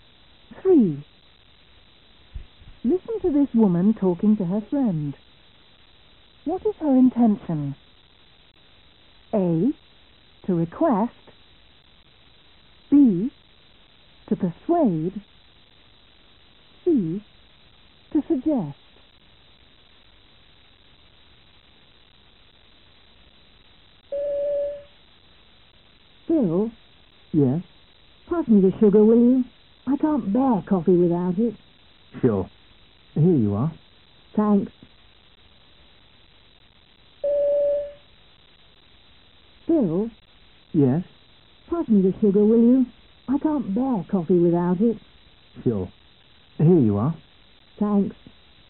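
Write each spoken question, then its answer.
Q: What is her intention?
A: A: To request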